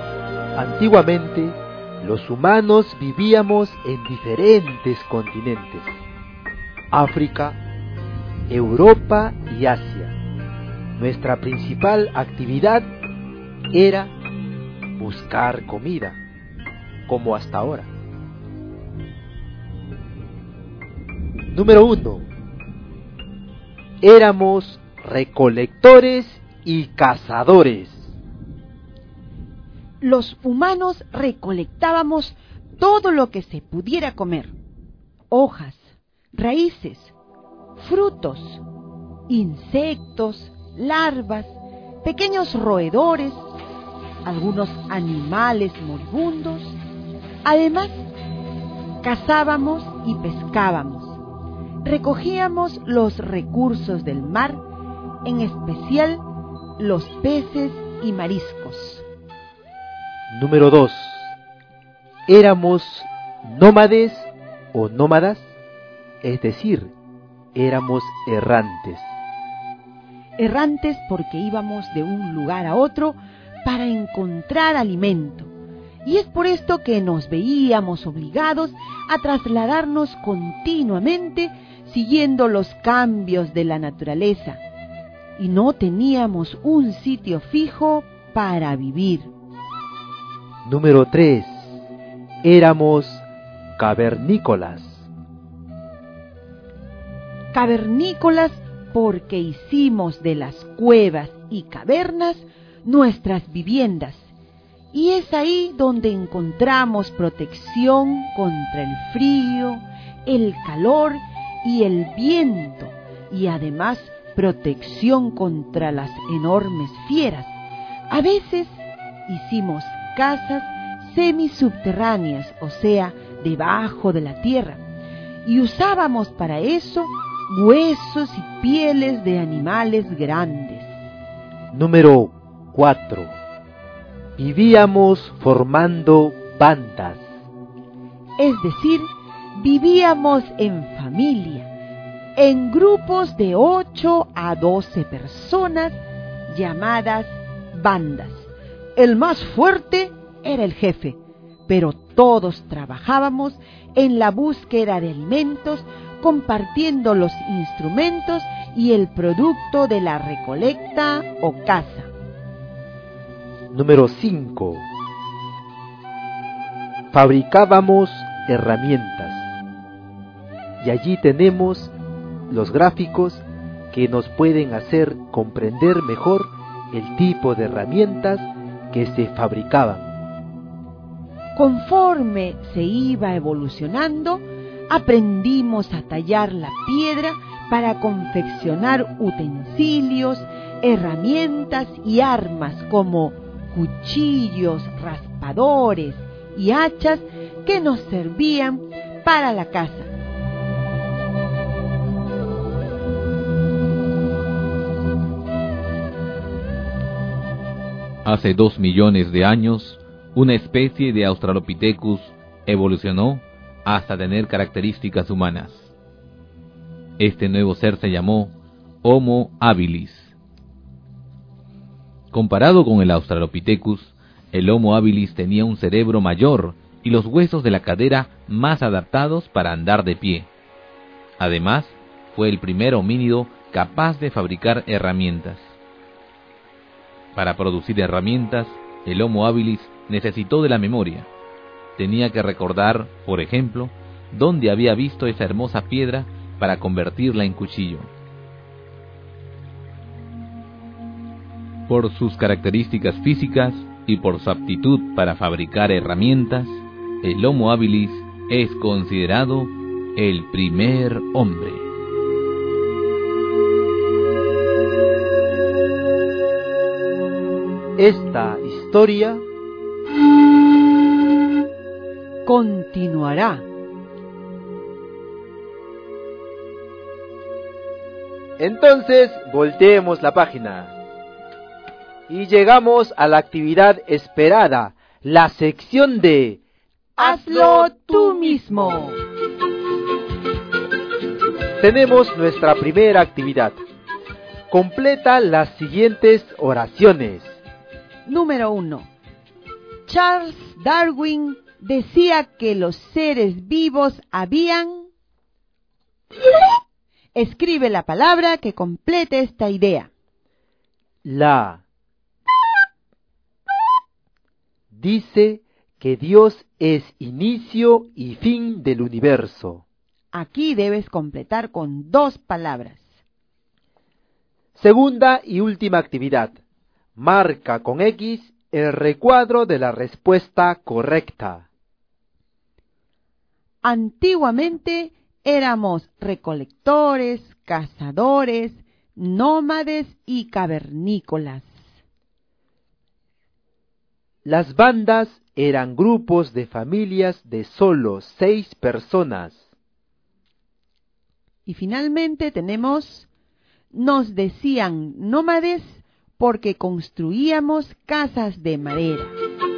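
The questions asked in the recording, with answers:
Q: Antiguamente éramos recolectores, cazadores, nómades y cavernícolas.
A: Sí (verdadero)

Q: Las bandas eran grupos de familias de solo 6 personas.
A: No (eran de 8 a 12 personas)

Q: Y finalmente tenemos, nos decían nómades porque construíamos casas de madera.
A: No (porque íbamos de un lugar a otro)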